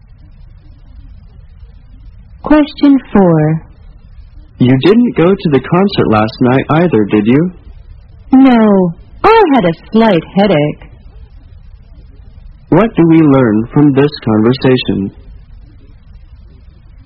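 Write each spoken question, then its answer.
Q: What do we learn from this conversation?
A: Neither of them went to the concert last night.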